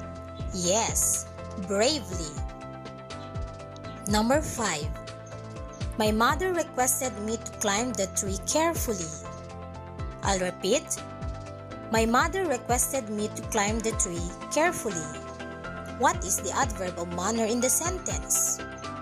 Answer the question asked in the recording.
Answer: Yes, the word carefully.